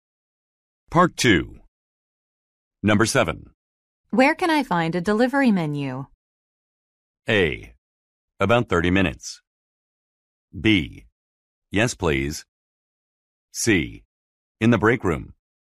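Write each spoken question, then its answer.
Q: Where can I find a delivery menu?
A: C: In the break room.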